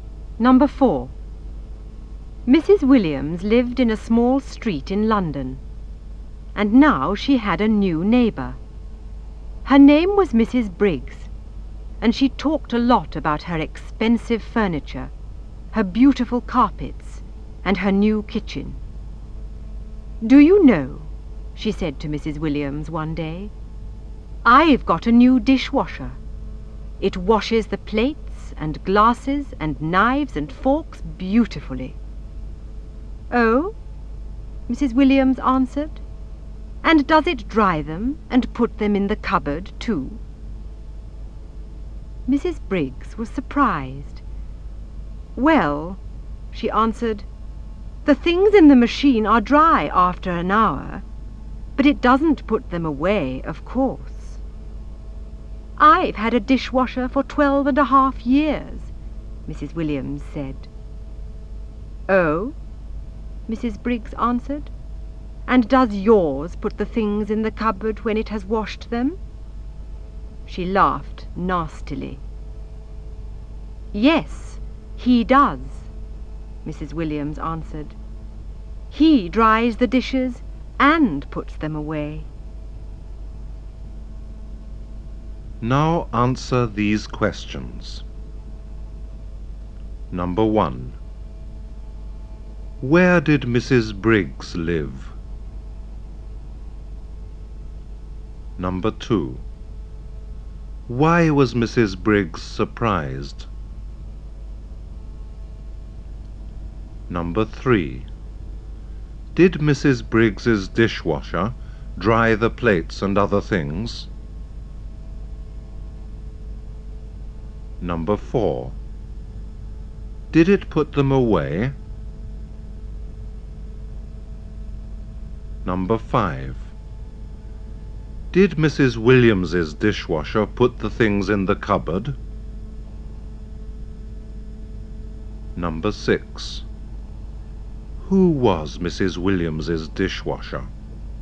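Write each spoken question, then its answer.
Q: Where did Mrs. Briggs live?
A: In a small street in London, next to Mrs. Williams

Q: Why was Mrs. Briggs surprised?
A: Because Mrs. Williams asked if her dishwasher dried the things and put them in the cupboard

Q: Did Mrs. Briggs's dishwasher dry the plates and other things?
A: Yes

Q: Did it put them away?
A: No

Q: Did Mrs. Williams's dishwasher put the things in the cupboard?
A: Yes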